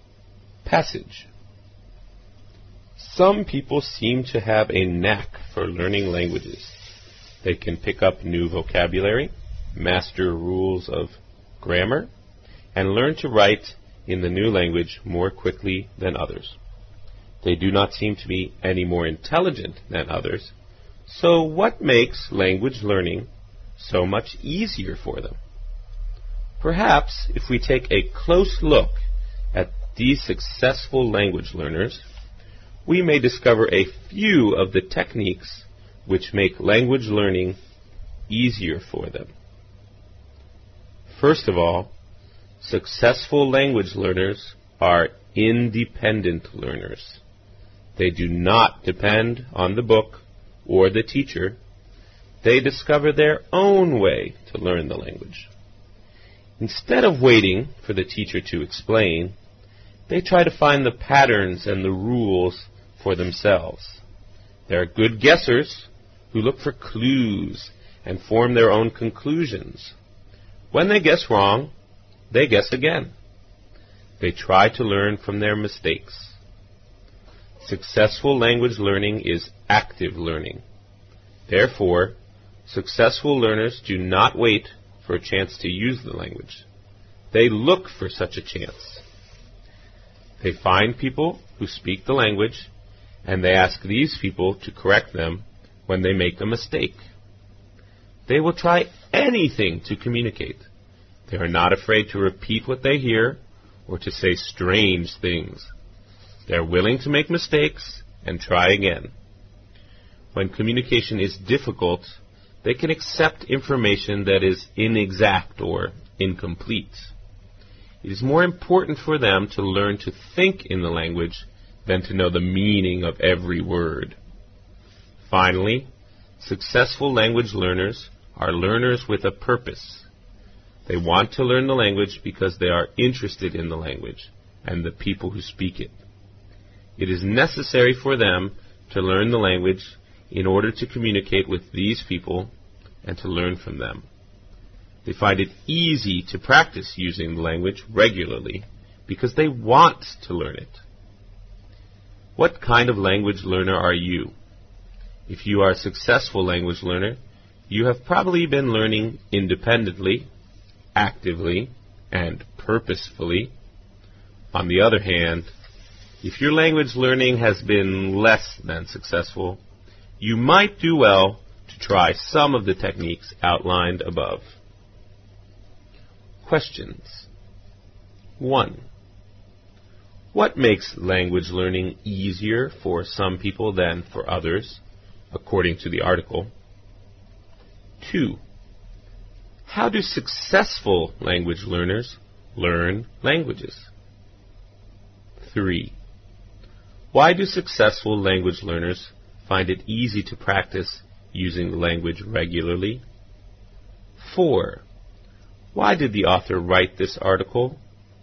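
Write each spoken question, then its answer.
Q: What makes language learning easier for some people than for others, according to the article?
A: The techniques they use: they learn independently, actively and with a purpose.

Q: How do successful language learners learn languages?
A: Independently, actively and purposefully.

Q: Why do successful language learners find it easy to practice using the language regularly?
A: Because they want to learn it.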